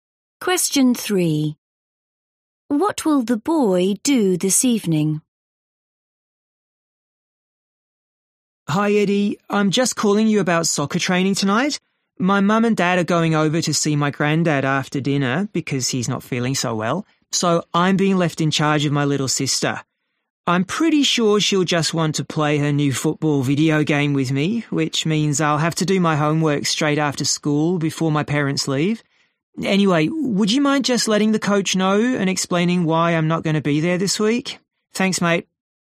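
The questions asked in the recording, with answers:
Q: What will the boy do this evening?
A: Look after his little sister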